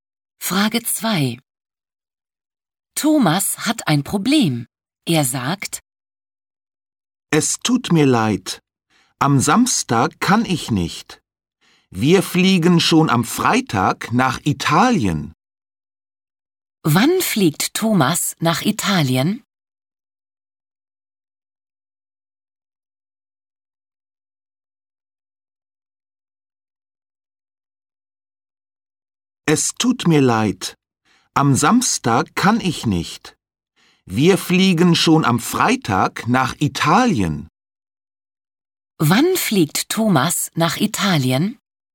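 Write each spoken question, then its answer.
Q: Wann fliegt Thomas nach Italien?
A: Am Freitag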